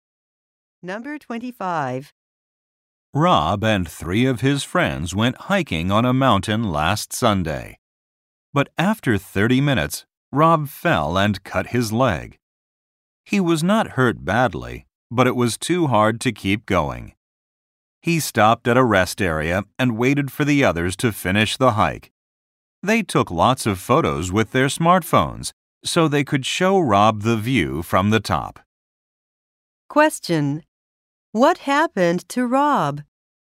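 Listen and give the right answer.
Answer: He fell and cut his leg and couldn't finish the hike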